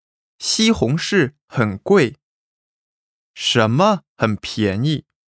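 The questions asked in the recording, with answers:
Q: 什么很便宜?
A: 黄瓜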